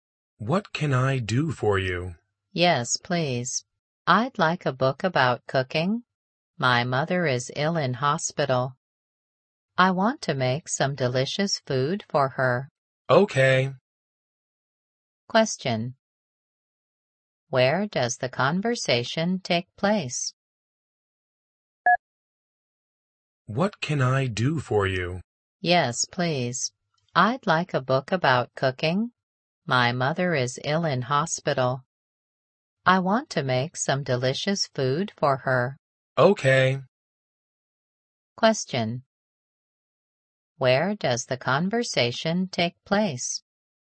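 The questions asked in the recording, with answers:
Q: Where does the conversation take place?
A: In a bookstore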